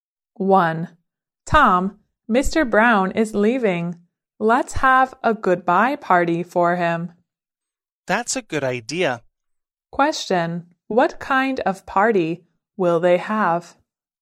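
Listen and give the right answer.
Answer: A goodbye party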